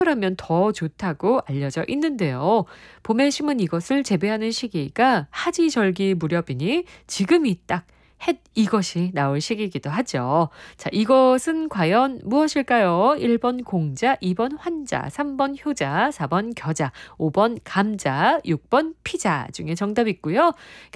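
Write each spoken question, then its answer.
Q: 자, 이것은 과연 무엇일까요?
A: 5번: 감자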